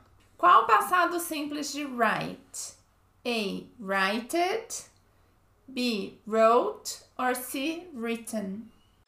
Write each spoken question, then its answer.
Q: Qual o passado simples de write?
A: B. Wrote. Passado simples, wrote.